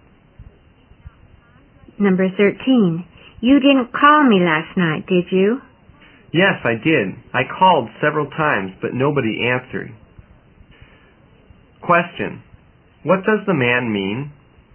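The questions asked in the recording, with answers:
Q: what does the man mean?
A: He called several times but nobody answered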